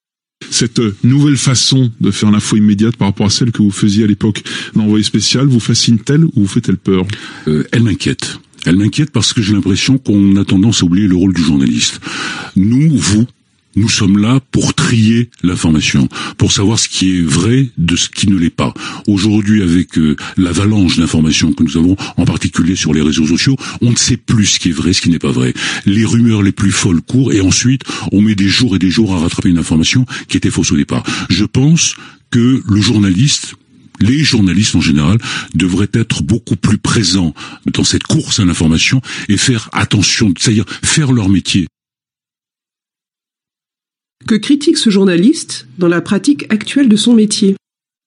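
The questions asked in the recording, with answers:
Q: Que critique ce journaliste dans la pratique actuelle de son métier ?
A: On oublie le rôle du journaliste : trier l'information et vérifier ce qui est vrai, ce qui laisse circuler des rumeurs et de fausses informations.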